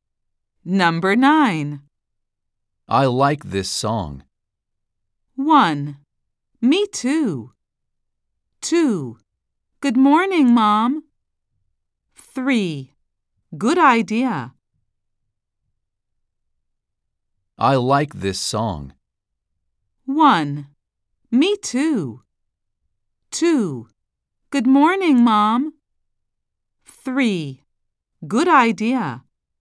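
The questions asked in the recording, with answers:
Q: I like this song.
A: 1: Me too.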